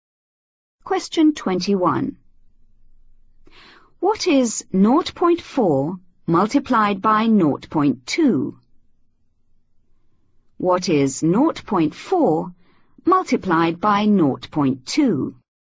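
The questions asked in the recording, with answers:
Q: What is 0.4 multiplied by 0.2?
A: 0.08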